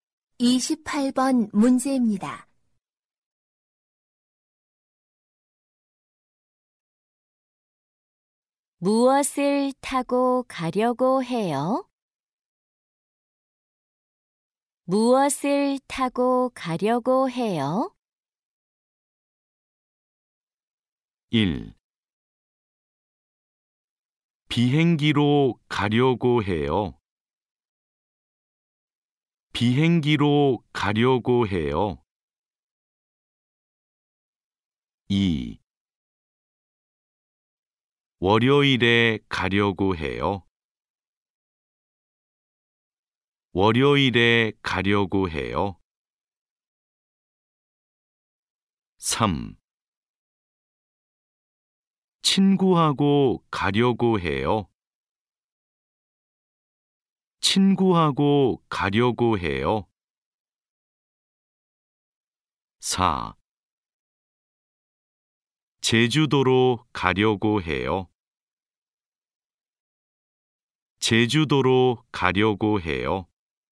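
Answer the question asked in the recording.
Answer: 1: 비행기로 가려고 해요.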